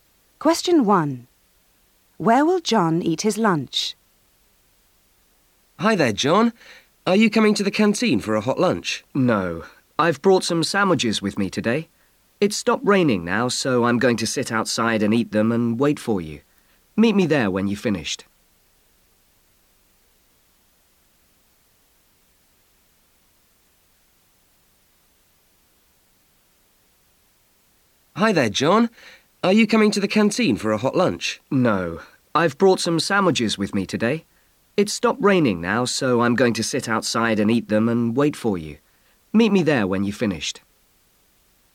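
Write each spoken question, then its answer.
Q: Where will John eat his lunch?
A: Outside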